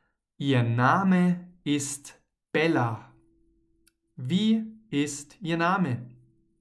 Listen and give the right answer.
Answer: Bella. Ihr Name ist Bella.